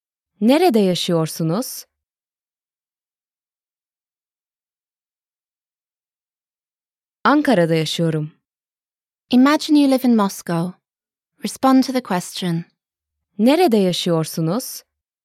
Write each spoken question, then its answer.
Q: Nerede yaşıyorsunuz?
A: Moskova'da yaşıyorum.